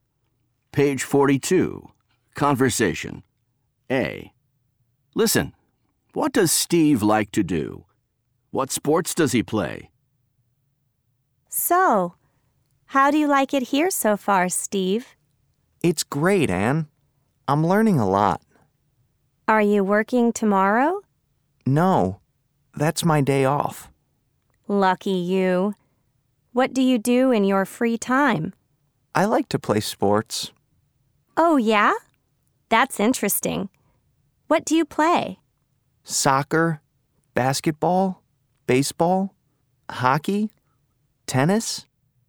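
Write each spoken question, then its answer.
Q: what does Steve like to do?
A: play sports

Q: What sports does he play?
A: soccer, basketball, baseball, hockey, tennis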